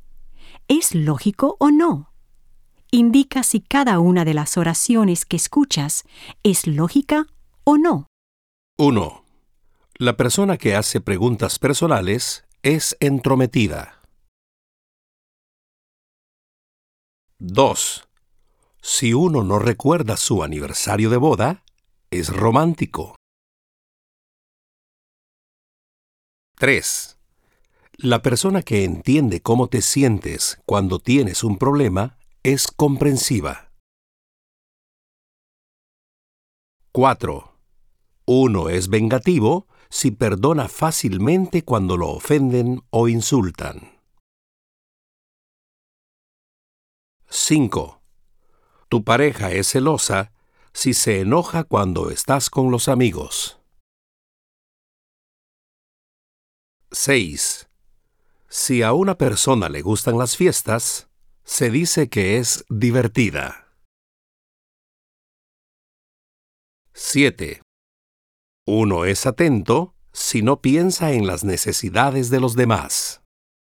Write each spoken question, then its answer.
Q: La persona que hace preguntas personales es entrometida.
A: 1. Lógico.

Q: Si uno no recuerda su aniversario de boda, es romántico.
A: 2. Ilógico.

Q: La persona que entiende cómo te sientes cuando tienes un problema es comprensiva.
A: 3. Lógico.

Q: Uno es vengativo si perdona fácilmente cuando lo ofenden o insultan.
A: 4. Ilógico.

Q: Tu pareja es celosa si se enoja cuando estás con los amigos.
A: 5. Lógico.

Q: Si a una persona le gustan las fiestas, se dice que es divertida.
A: 6. Lógico.

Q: Uno es atento si no piensa en las necesidades de los demás.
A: 7. Ilógico.